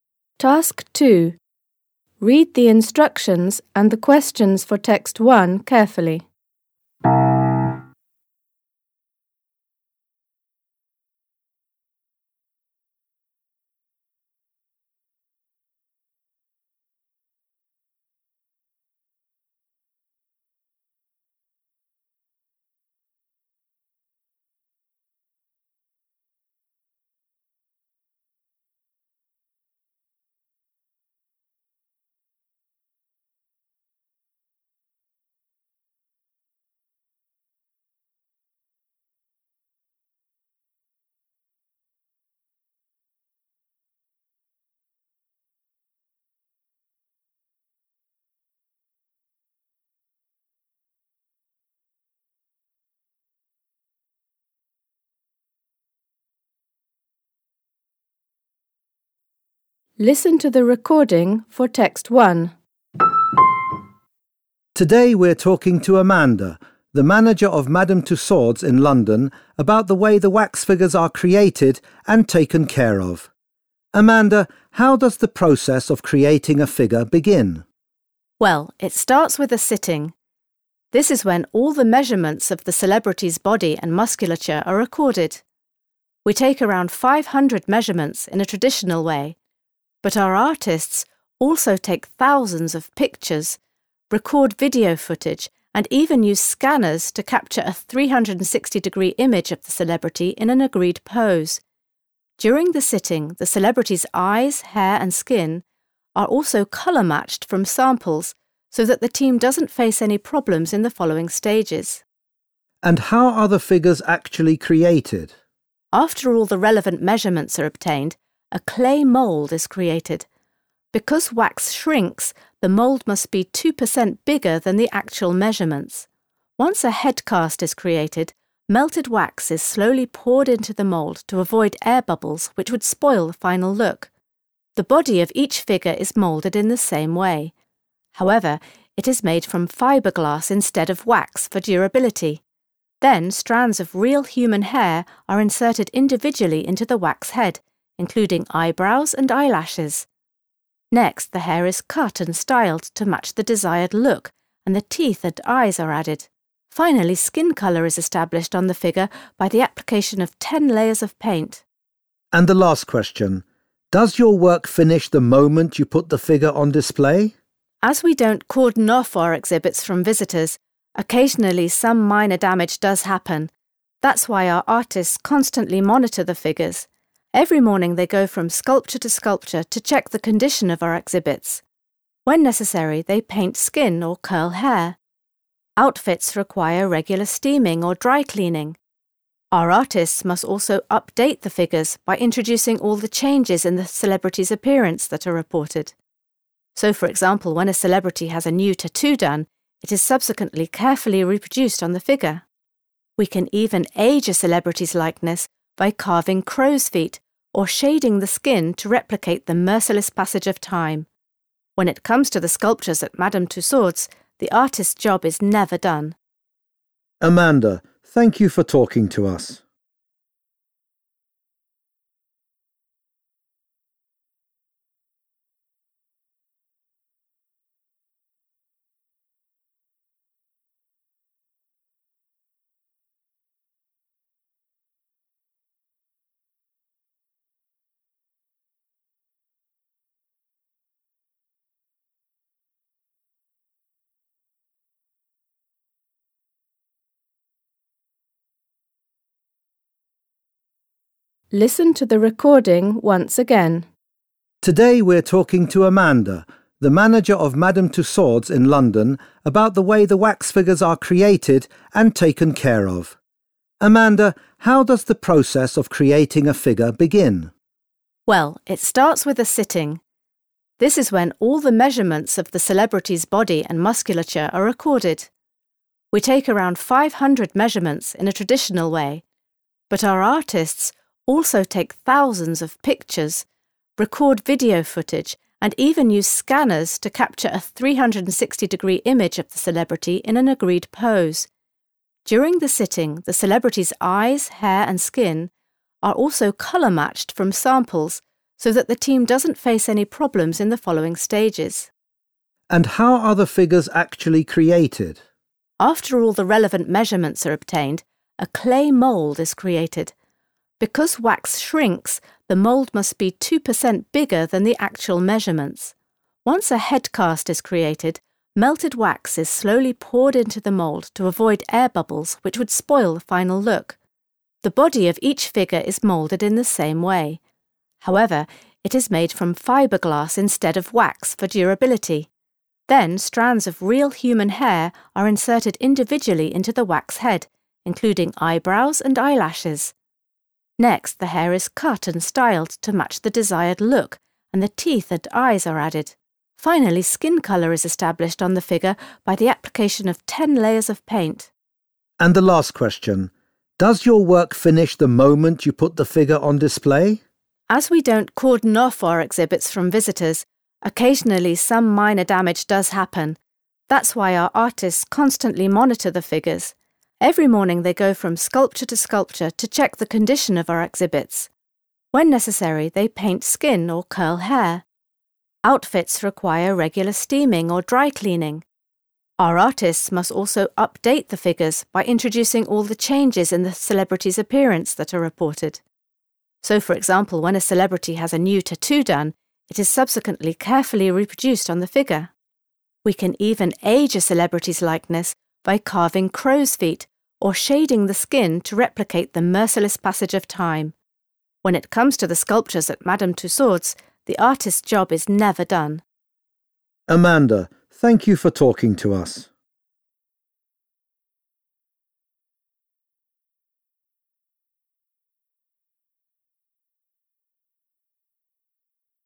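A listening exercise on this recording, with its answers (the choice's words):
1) While elaborating on the measurement stage, Amanda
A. explains how the model's final pose is agreed upon.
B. highlights the importance of having a number of sittings.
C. justifies the decision to refrain from using the latest technologies.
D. draws attention to the use of multiple methods to collect the required data.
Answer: draws attention to the use of multiple methods to collect the required data.

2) Which is TRUE about the process of creating the figure?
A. The clay moulds exactly match the measurements taken from the celebrity.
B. Imperfections may occur if a certain procedure is carried out too rapidly.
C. Custom-made wigs with natural hair are prepared for the figures.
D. Wax is used to create both the head and body of the figure.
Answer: Imperfections may occur if a certain procedure is carried out too rapidly.

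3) When answering the last question, Amanda focuses on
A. the continuous need to adjust and maintain the figures.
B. efforts made to mitigate the signs of ageing on the figures.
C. the measures taken to protect the figures from getting damaged.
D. updating the outfits worn by the figures in line with contemporary trends.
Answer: the continuous need to adjust and maintain the figures.

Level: Poziom: dwujęzyczny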